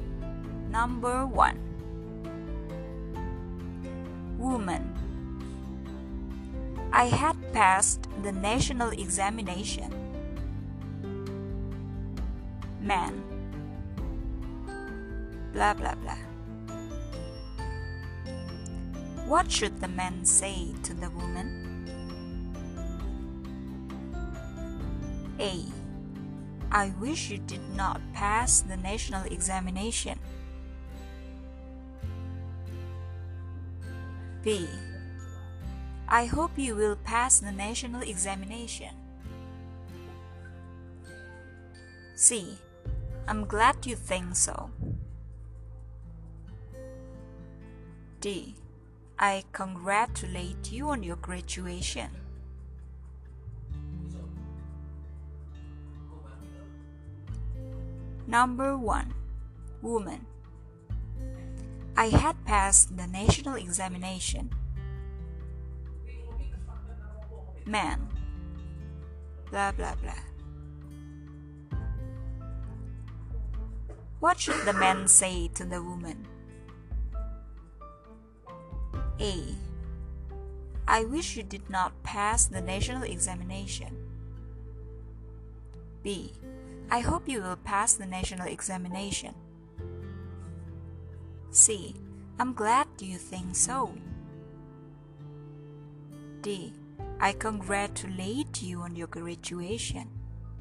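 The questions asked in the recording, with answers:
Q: What should the man say to the woman?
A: D: I congratulate you on your graduation.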